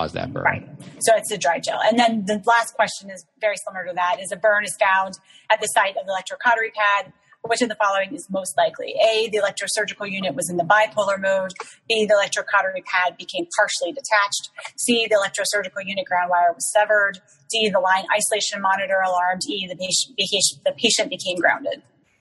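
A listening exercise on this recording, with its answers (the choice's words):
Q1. Burn found at site of Bovie pad. Which of following most likely?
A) ESU in bipolar mode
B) Pad partially detached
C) ESU line severed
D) LIM alarm that patient became grounded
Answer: Pad partially detached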